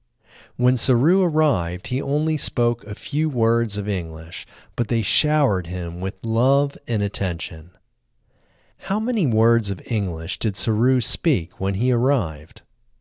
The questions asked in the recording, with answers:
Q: How many words of English did Saru speak when he arrived?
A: Saru only spoke a few words of English when he arrived.